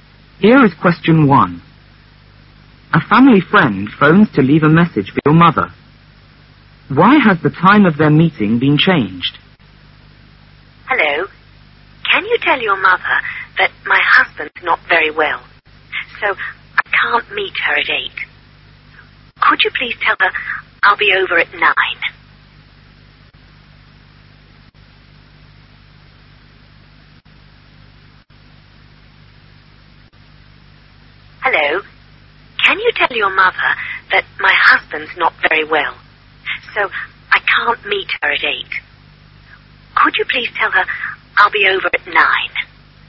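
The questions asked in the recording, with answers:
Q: Why has the time of their meeting been changed?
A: Because her husband is not very well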